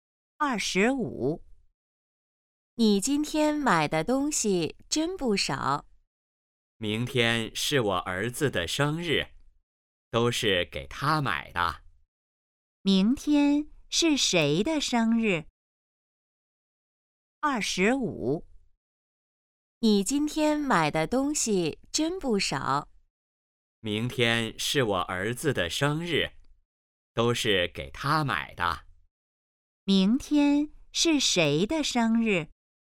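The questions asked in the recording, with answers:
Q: 明天是谁的生日?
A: 儿子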